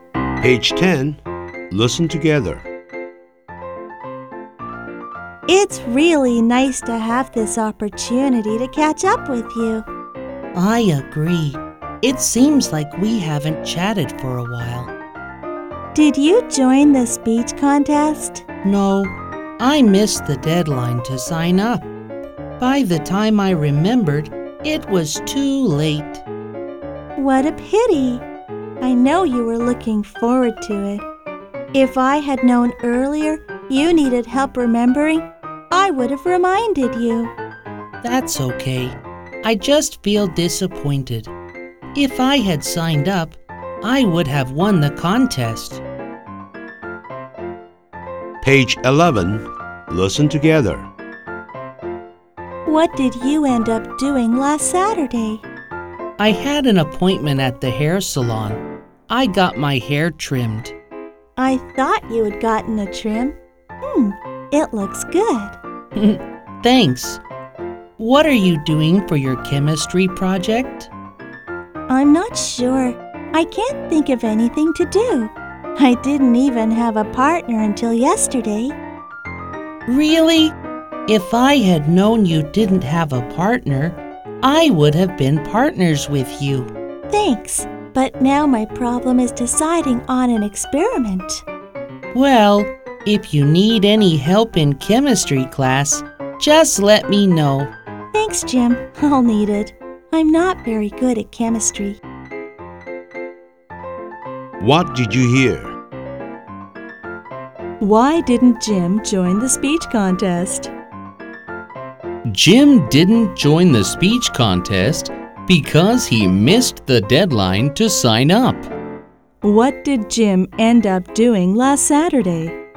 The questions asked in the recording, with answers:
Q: What did Jim end up doing last Saturday?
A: He got his hair trimmed.